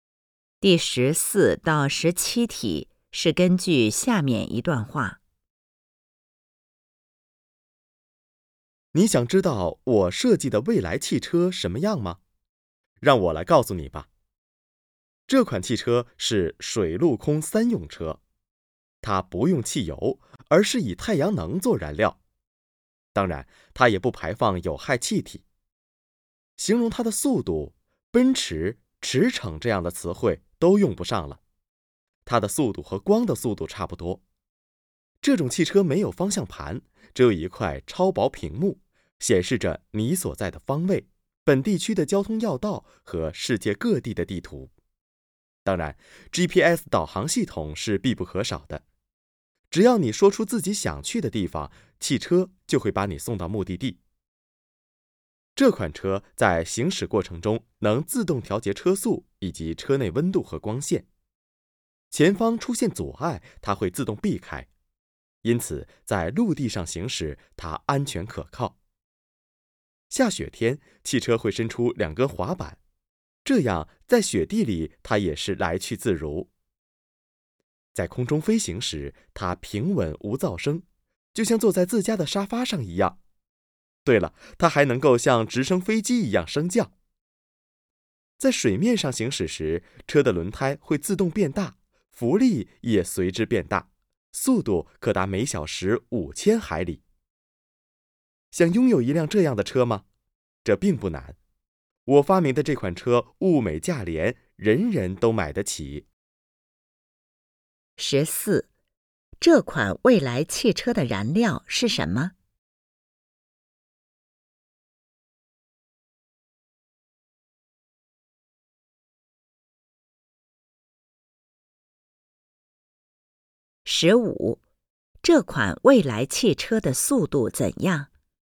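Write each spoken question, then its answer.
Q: 这款未来汽车的燃料是什么?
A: 太阳能

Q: 这款未来汽车的速度怎样?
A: 和光的速度差不多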